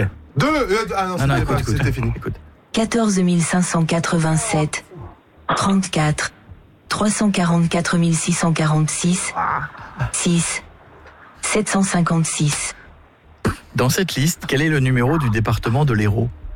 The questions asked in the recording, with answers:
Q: Dans cette liste, quel est le numéro du département de l'Hérault?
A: 34, oui. Voilà, bravo.